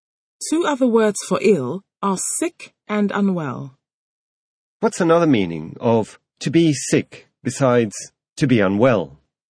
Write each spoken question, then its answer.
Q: What's another meaning of to be sick besides to be unwell?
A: Another meaning of to be sick besides to be unwell is to vomit.